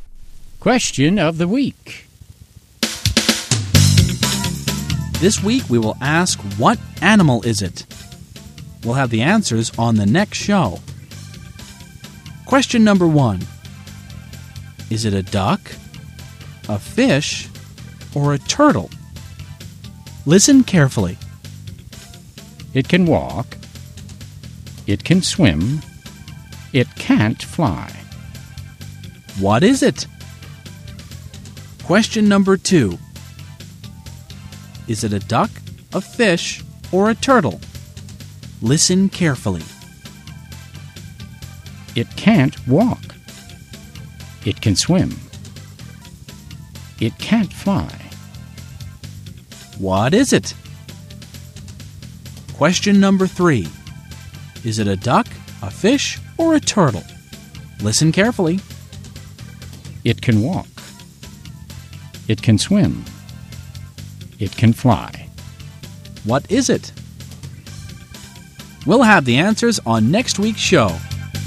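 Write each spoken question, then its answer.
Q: Question number one. Is it a duck, a fish, or a turtle?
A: a turtle

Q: Is it a duck, a fish, or a turtle?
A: a fish

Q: Is it a duck, a fish, or a turtle?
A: a duck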